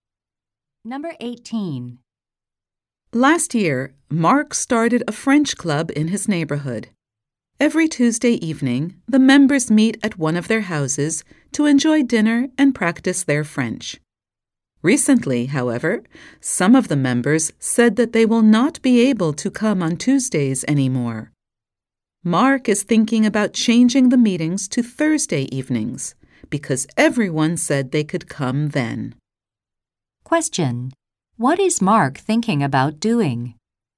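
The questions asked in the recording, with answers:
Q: What is Mark thinking about doing?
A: Changing the club meetings to Thursday evenings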